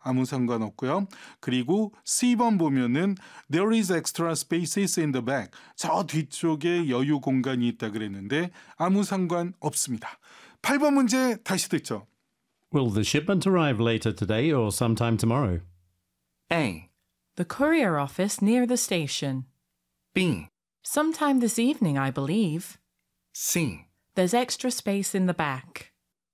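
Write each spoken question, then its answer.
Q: Will the shipment arrive later today or sometime tomorrow?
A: B: Sometime this evening, I believe.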